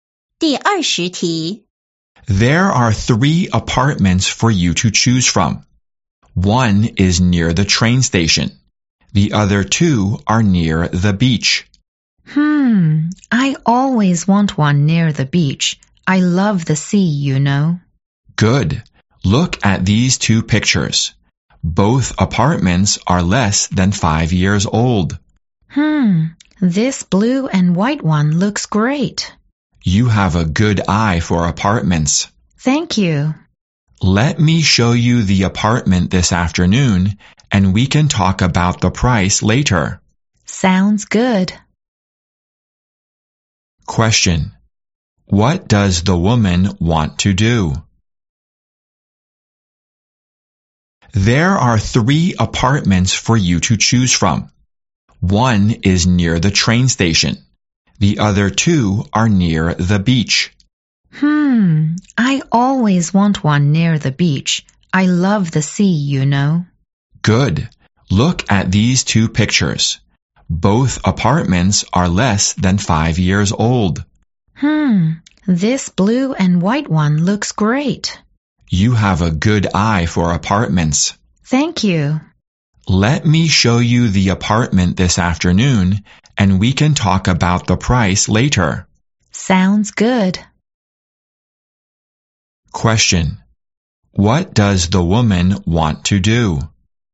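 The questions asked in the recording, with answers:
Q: What does the woman want to do?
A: See the apartment near the beach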